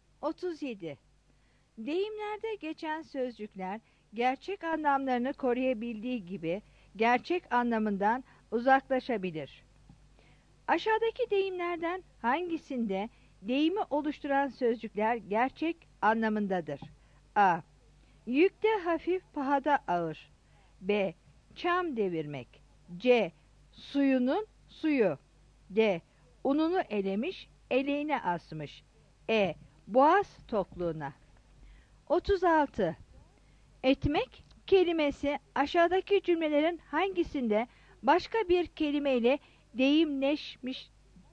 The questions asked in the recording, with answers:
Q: Aşağıdaki deyimlerden hangisinde deyimi oluşturan sözcükler gerçek anlamındadır?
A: 37 A